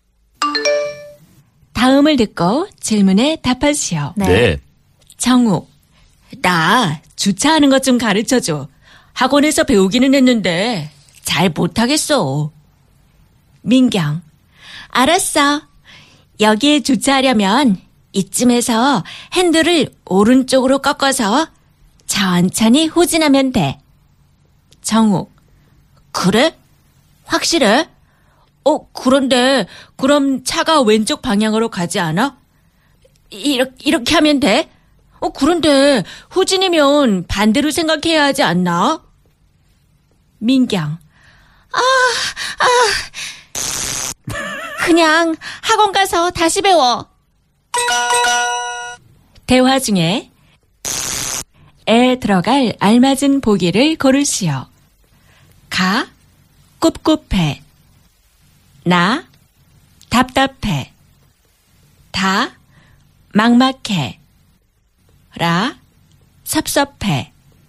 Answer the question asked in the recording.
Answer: Na. 답답해.